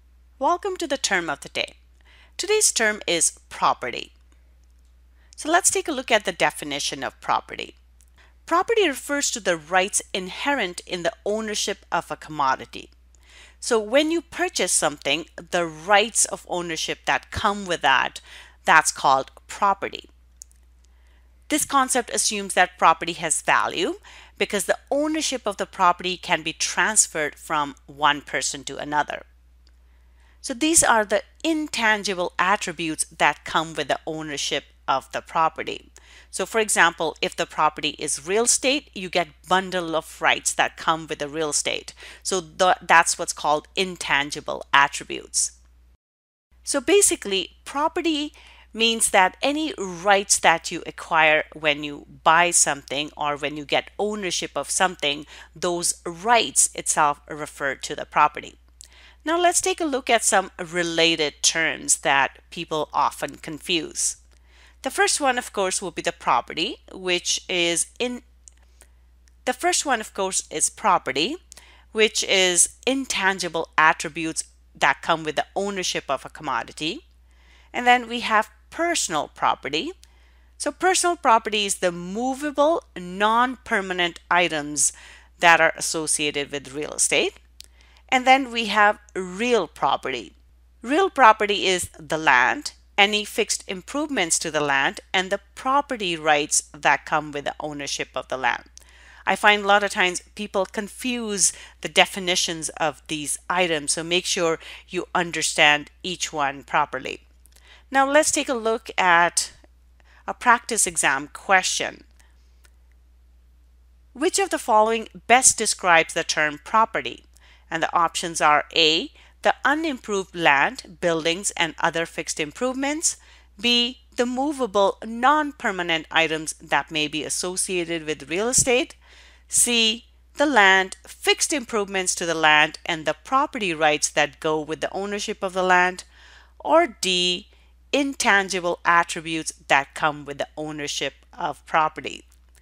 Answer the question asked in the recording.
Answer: So the correct answer here is D.